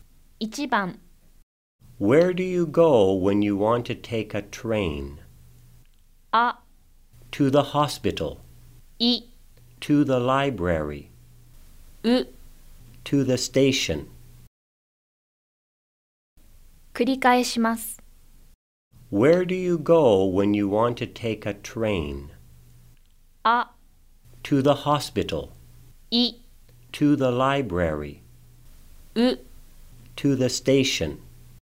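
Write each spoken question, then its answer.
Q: Where do you go when you want to take a train?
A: う: To the station.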